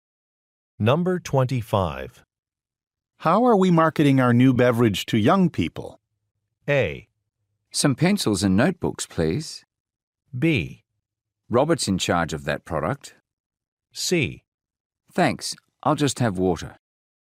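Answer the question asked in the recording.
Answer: B: Robert's in charge of that product.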